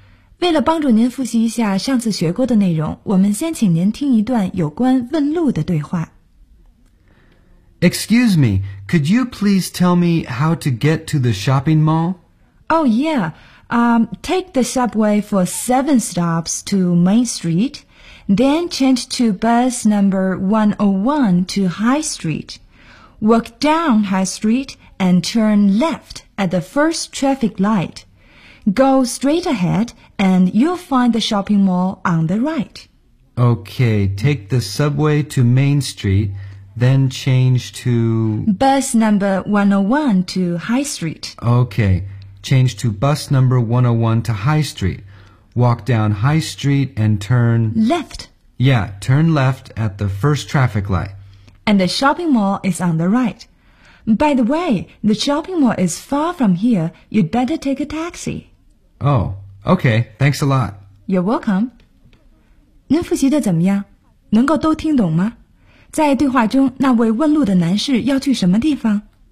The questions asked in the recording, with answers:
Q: 在对话中,那位问路的男士要去什么地方?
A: 他要去的是 shopping mall.